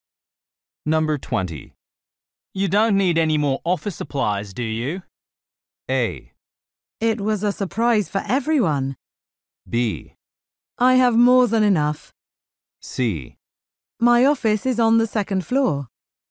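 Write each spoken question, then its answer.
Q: You don't need any more office supplies, do you?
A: B: I have more than enough.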